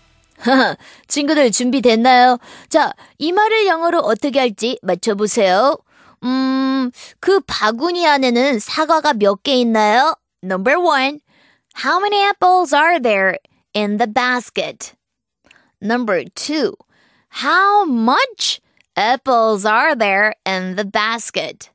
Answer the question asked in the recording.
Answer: how many를 시작하니까 1번이네요.